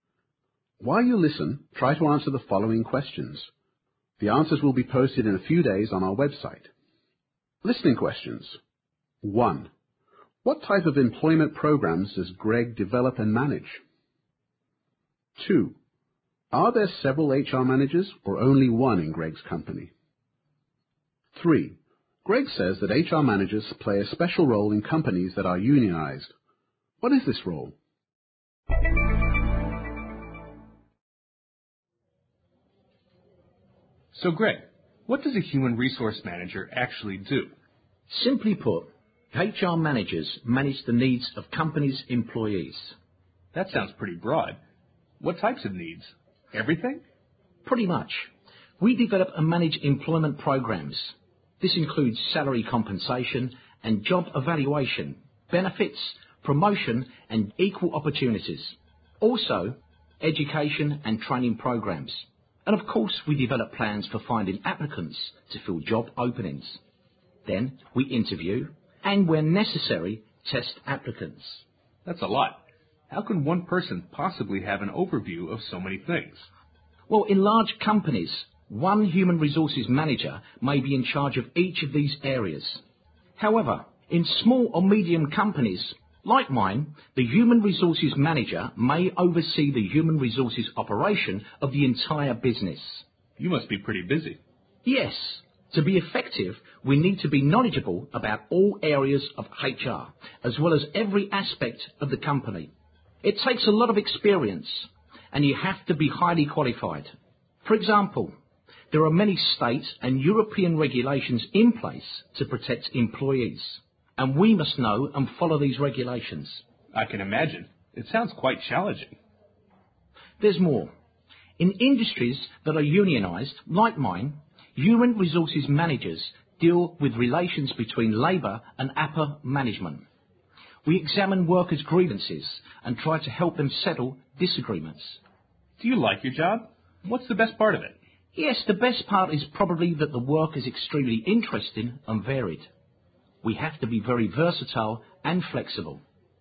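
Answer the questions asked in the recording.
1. Pay and job evaluation, benefits, promotion, equal opportunities, education and training, and plans for finding job applicants
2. Only one; his company is small or medium-sized, so one HR manager runs all of HR
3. They handle relations between workers and upper management, look into workers' complaints, and help settle disagreements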